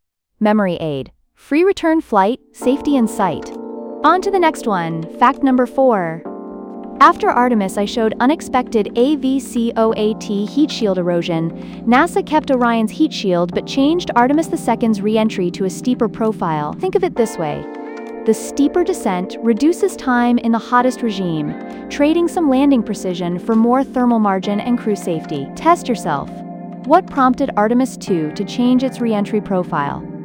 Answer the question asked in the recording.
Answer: Correct answer. AVCOAT, heat shield erosion on Artemis I.